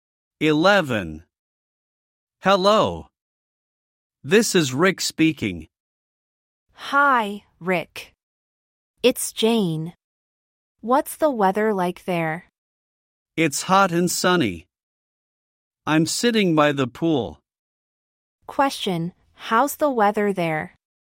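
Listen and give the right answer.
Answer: Hot and sunny.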